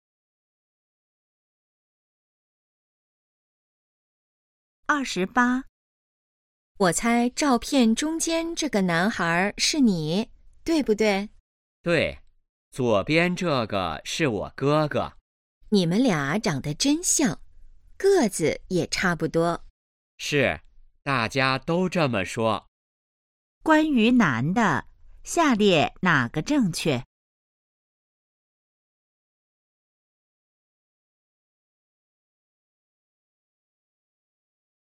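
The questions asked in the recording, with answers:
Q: 关于男的,下列哪个正确?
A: 和哥哥长得很像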